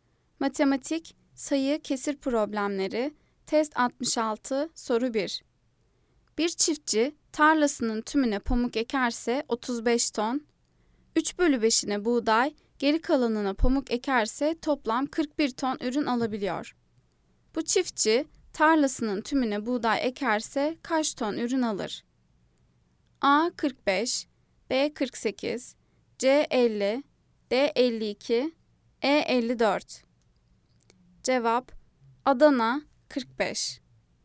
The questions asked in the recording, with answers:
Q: Bu çiftçi tarlasının tümüne buğday ekerse kaç ton ürün alır?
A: Cevap Adana 45.